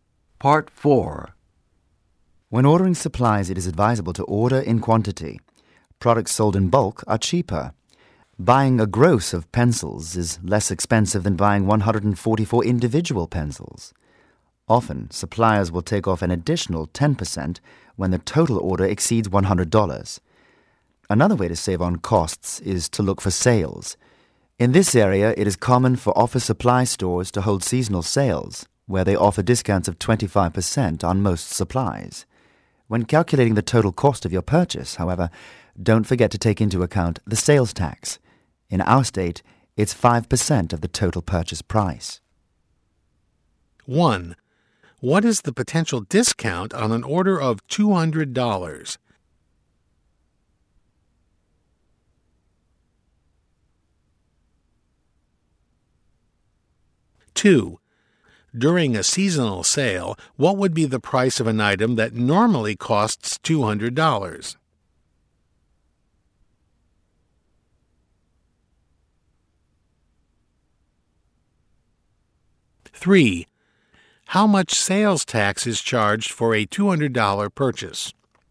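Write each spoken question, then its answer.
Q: What is the potential discount on an order of $200?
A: 10% ($20)

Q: During a seasonal sale, what would be the price of an item that normally costs $200?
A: $150

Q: how much sales tax is charged for a $200 purchase?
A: $10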